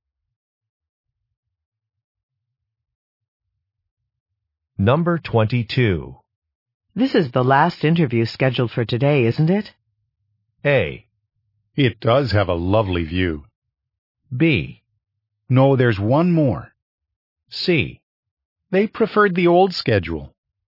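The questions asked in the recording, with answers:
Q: This is the last interview scheduled for today, isn't it?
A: B: No, there's one more.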